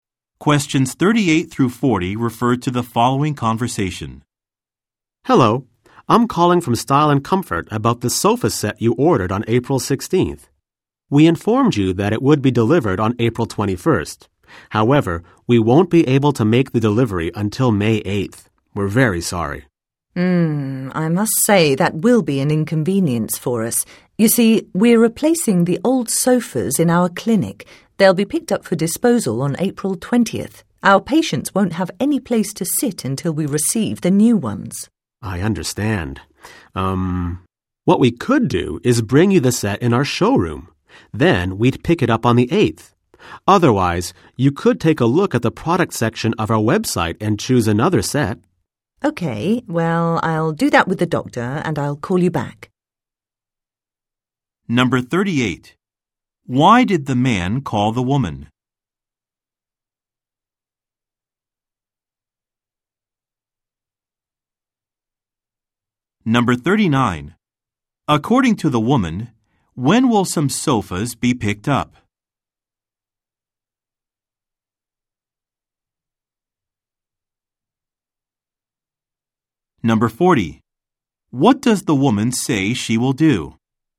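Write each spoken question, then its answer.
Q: Why did the man call the woman?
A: To tell her that the sofa set will be delivered late, on May 8th

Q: According to the woman, when will some sofas be picked up?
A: On April 20th

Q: What does the woman say she will do?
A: Look at the website with the doctor and call him back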